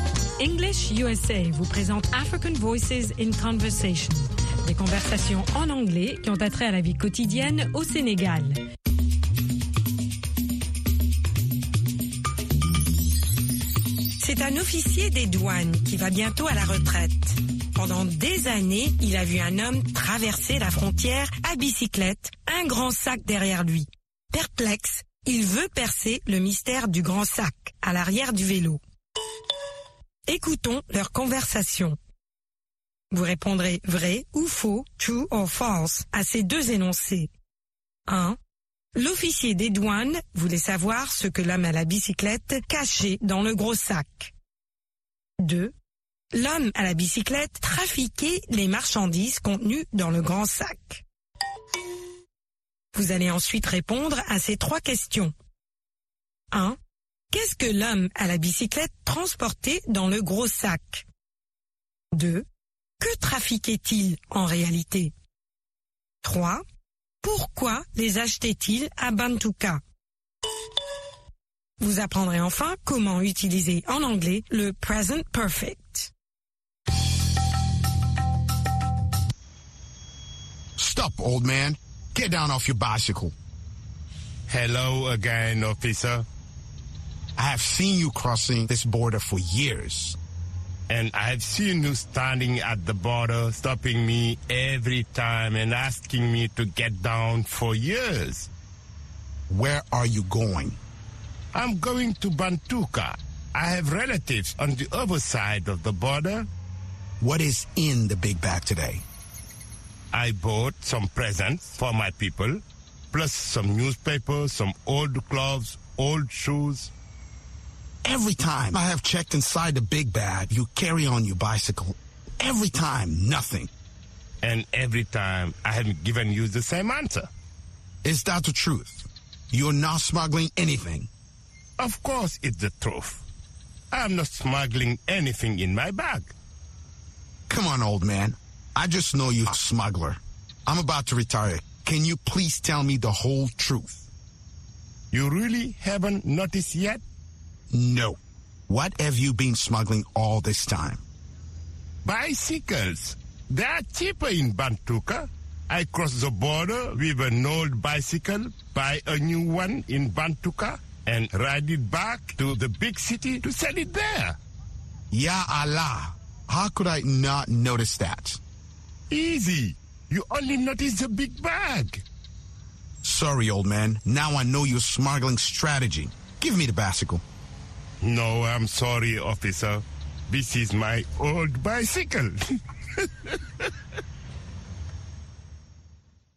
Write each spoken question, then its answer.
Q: L'officier des douanes voulait savoir ce que l'homme à la bicyclette cachait dans le gros sac.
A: L'énoncé 1 est vrai.

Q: l'homme à la bicyclette trafiquait les marchandises contenues dans le grand sac.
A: L'énoncé 2 est faux.

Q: Qu'est-ce que l'homme à la bicyclette transportait dans le gros sac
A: Des cadeaux, des journaux, de vieux habits et de vieilles chaussures.

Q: Que trafiquait-il en réalité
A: Des bicyclettes.

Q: Pourquoi les achetait-il à Bantuka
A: Parce qu'elles coûtent moins cher à Bantuka.